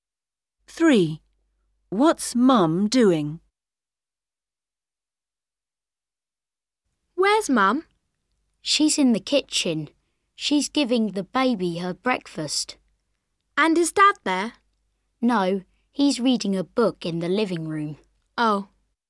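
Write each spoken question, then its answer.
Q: What's Mum doing?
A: giving the baby her breakfast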